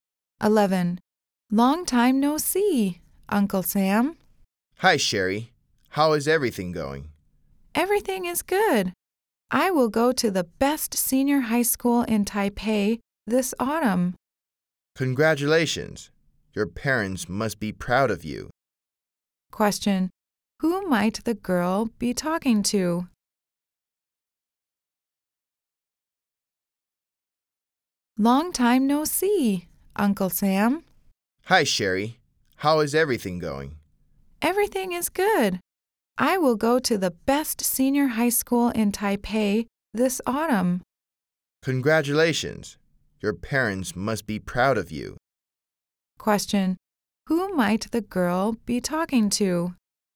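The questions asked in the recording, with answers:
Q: Question. Who might the girl be talking to?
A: Her uncle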